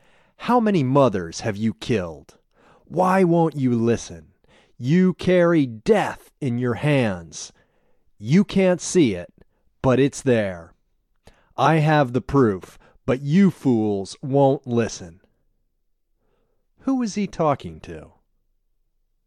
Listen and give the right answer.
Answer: He's talking to the other doctors.